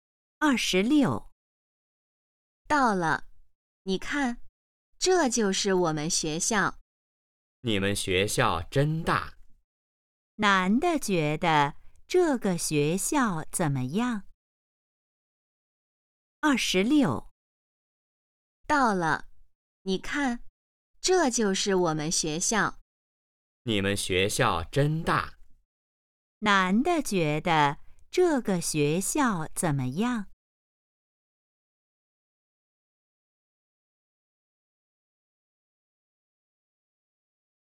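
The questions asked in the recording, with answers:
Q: 男的觉得这个学校怎么样?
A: 很大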